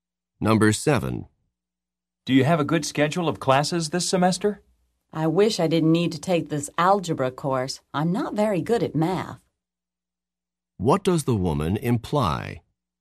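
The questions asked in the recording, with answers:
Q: What does the woman imply?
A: She has to take the algebra course.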